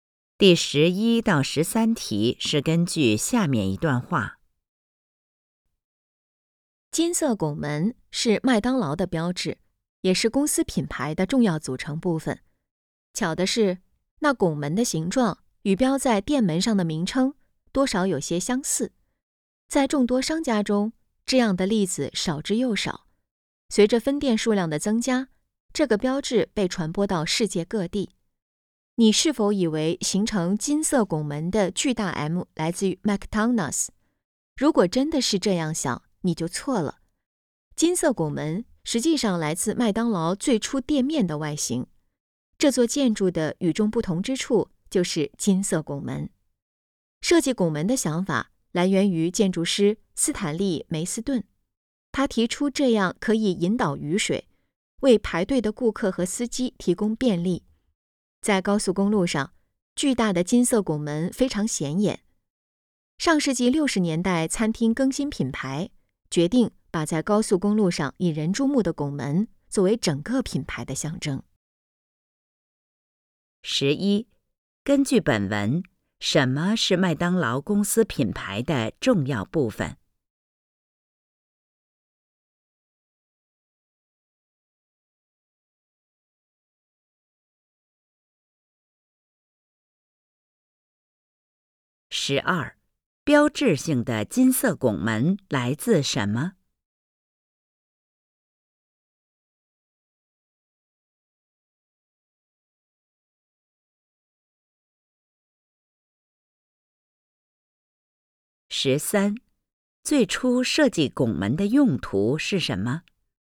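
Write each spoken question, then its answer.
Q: 十一,根据本文,什么是麦当劳公司品牌的重要部分?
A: 金色拱门

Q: 十二,标志性的金色拱门来自什么?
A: 麦当劳最初店面的外形

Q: 十三,最初设计拱门的用途是什么?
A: 引导雨水,为排队的顾客和司机提供便利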